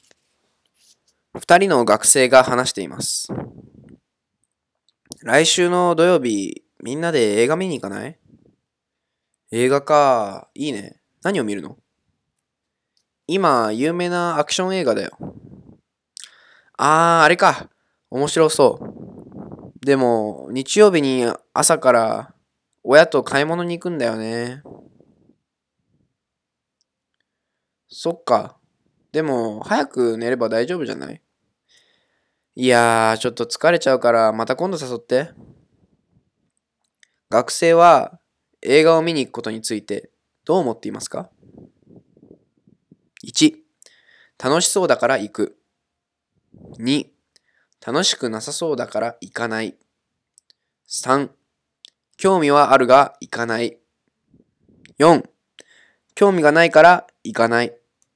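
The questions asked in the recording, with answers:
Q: 学生は映画を見に行くことについてどう思っていますか?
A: 3: 興味はあるが行かない。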